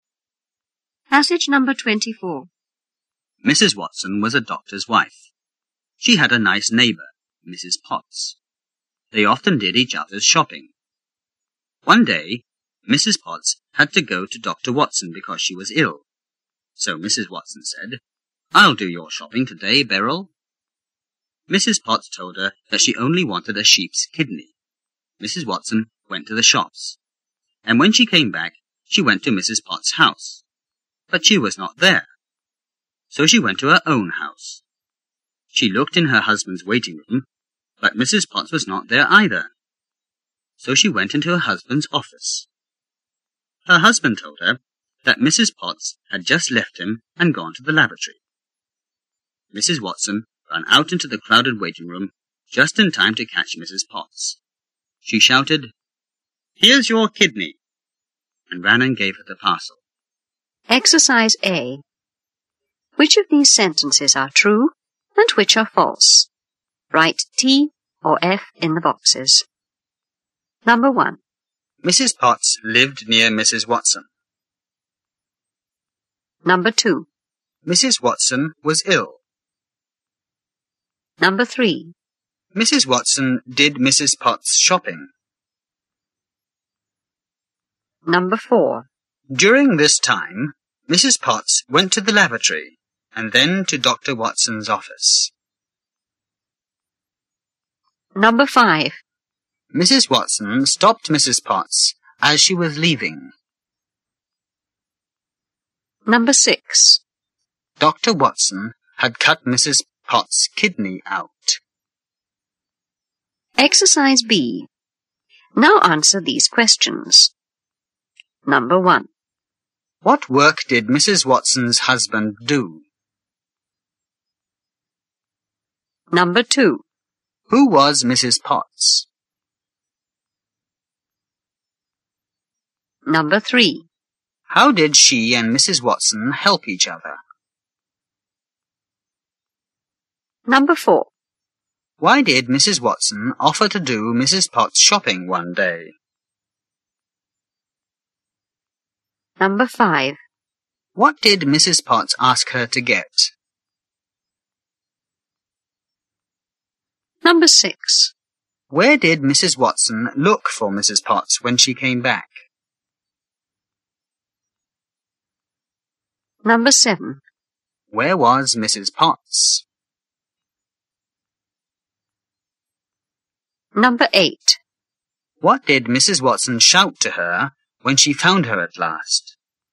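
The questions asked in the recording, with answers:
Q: What work did Mrs. Watson's husband do?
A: He was a doctor.

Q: Who was Mrs. Potts?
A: Mrs. Watson's neighbour.

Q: How did she and Mrs. Watson help each other?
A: They often did each other's shopping.

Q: Why did Mrs. Watson offer to do Mrs. Potts' shopping one day?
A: Mrs. Potts was ill and had to go to Dr. Watson.

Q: What did Mrs. Potts ask her to get?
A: A sheep's kidney.

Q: Where did Mrs. Watson look for Mrs. Potts when she came back?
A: In Mrs. Potts' house, then in her husband's waiting room and office.

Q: Where was Mrs. Potts?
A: She had left the doctor and was going through the crowded waiting room to the laboratory.

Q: What did Mrs. Watson shout to her when she found her at last?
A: "Here's your kidney."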